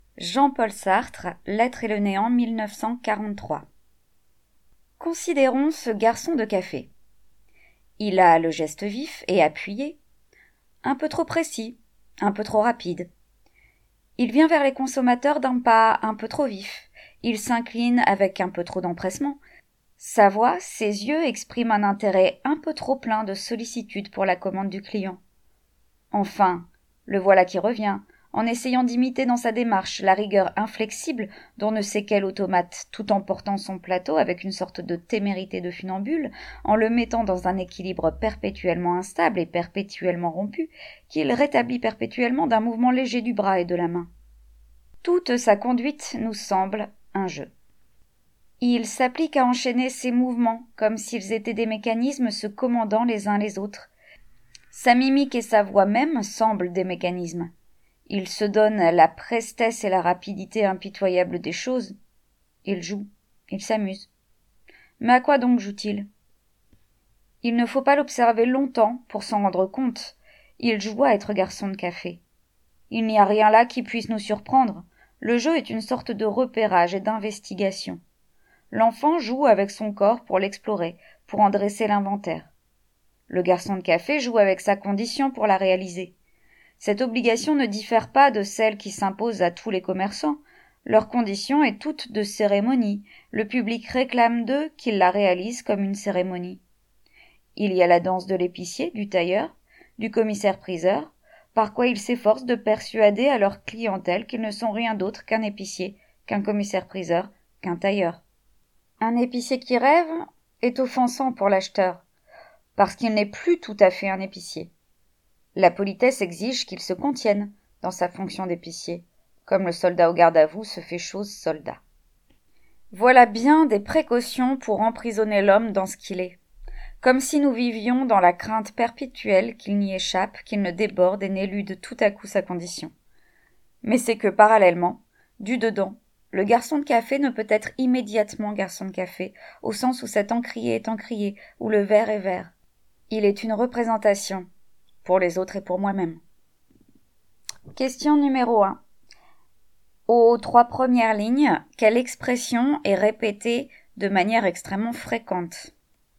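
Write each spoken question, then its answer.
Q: Aux trois premières lignes, quelle expression est répétée de manière extrêmement fréquente?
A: « un peu trop »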